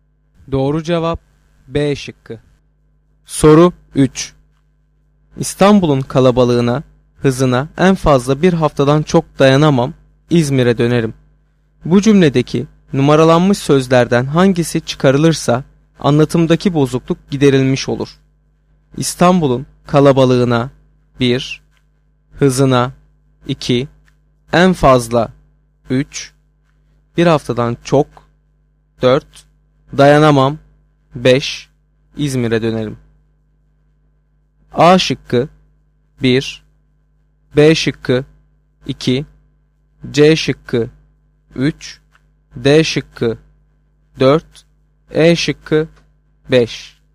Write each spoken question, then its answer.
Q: Bu cümledeki numaralanmış sözlerden hangisi çıkarılırsa anlatımdaki bozukluk giderilmiş olur.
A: Doğru cevap C şıkkı.